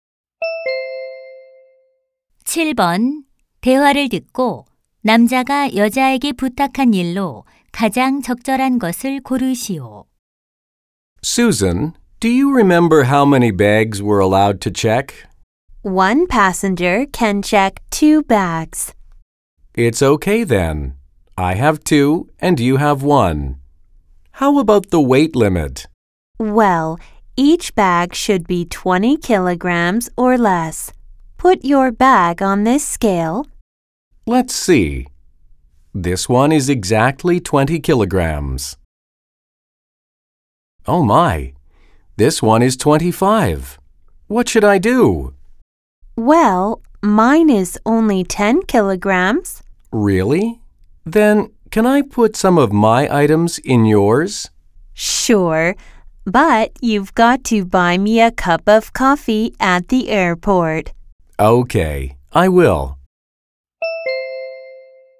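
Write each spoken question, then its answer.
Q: 대화를 듣고 남자가 여자에게 부탁한 일로 가장 적절한 것을 고르시오.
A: 자신의 짐 일부를 여자의 가방에 넣어 주기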